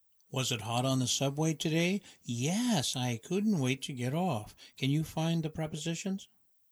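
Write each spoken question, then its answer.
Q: Can you find the prepositions?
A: on, off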